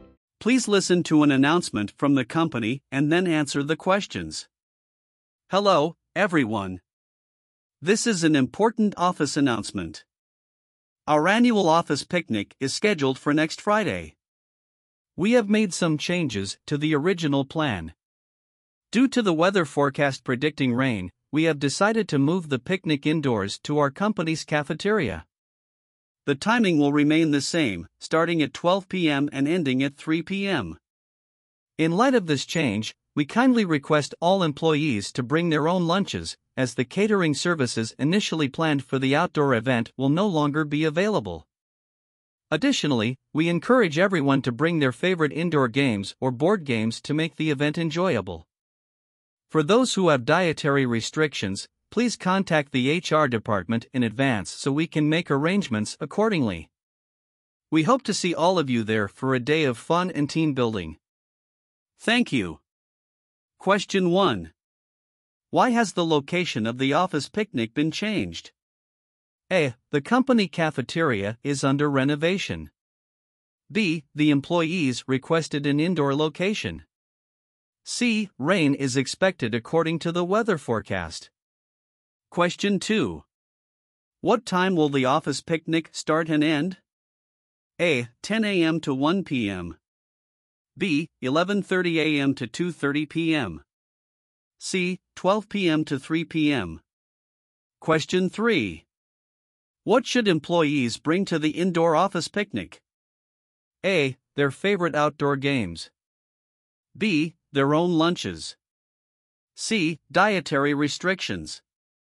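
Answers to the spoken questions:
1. C: Rain is expected according to the weather forecast.
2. C: 12 p.m. to 3 p.m.
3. B: Their own lunches.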